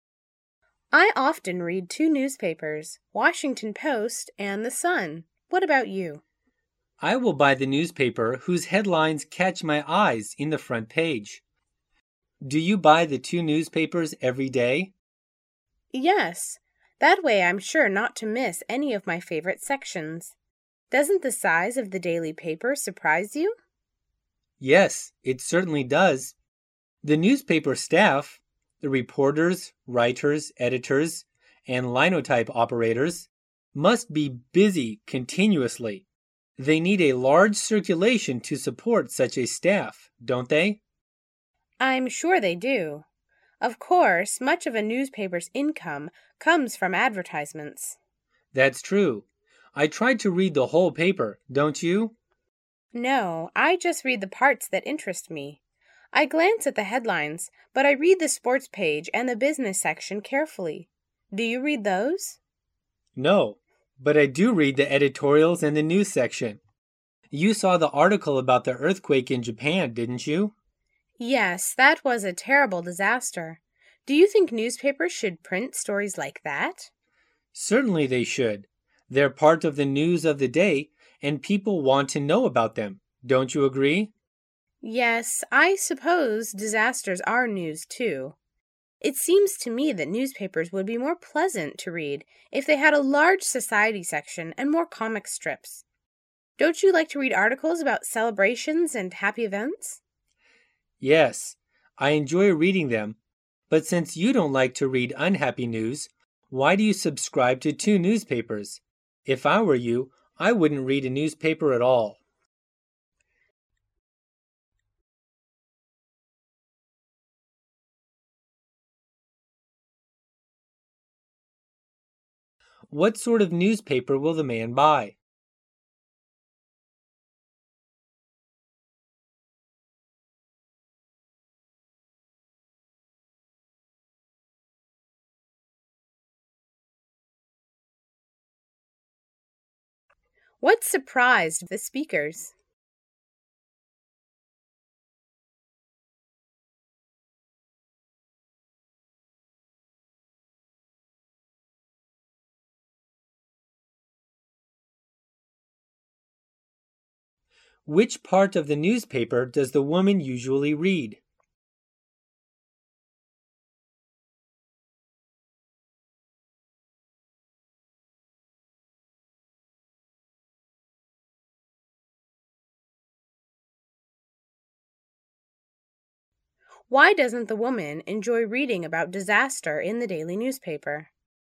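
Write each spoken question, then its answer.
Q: What sort of newspaper will the man buy?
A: One whose front-page headlines catch his eye

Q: What surprised the speakers?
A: The size of the daily paper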